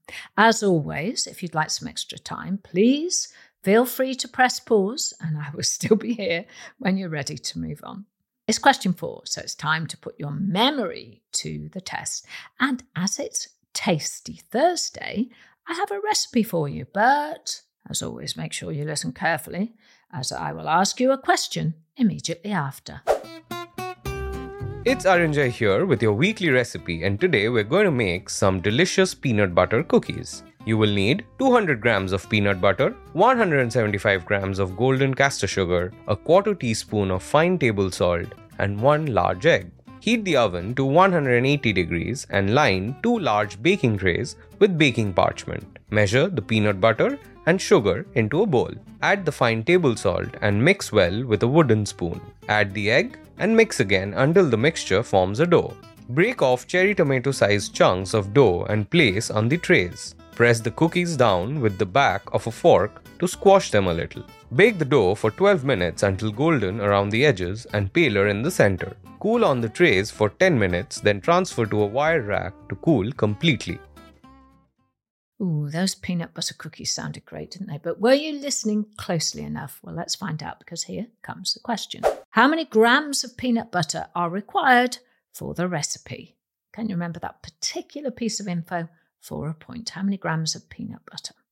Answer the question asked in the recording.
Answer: The answer is 200 grams of peanut butter.